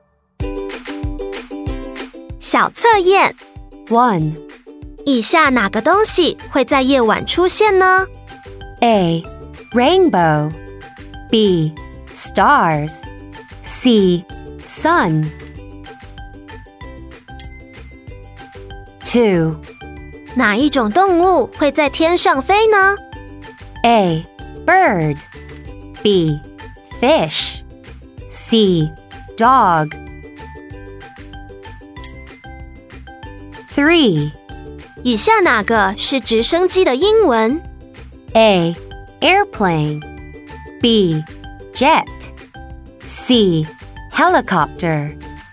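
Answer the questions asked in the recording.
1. B: Stars
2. A: Bird
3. C: Helicopter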